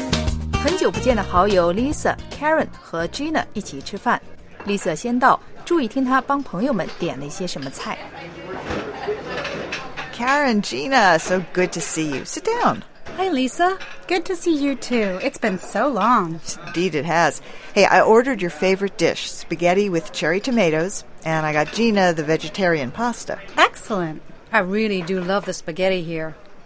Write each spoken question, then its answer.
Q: 注意听她帮朋友们点了一些什么菜。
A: Lisa 最早一个到,已经帮 Karen 和 Gina 点好了他们最爱吃的菜。